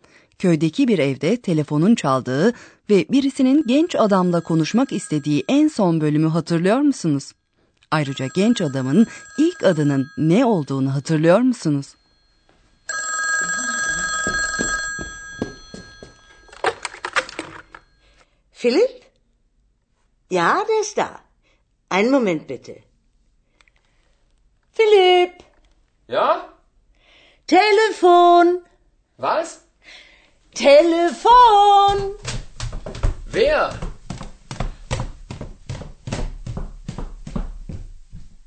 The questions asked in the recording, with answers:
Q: Ayrıca genç adamın ilk adının ne olduğunu hatırlıyor musunuz?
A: O genç adamın adı Filipti.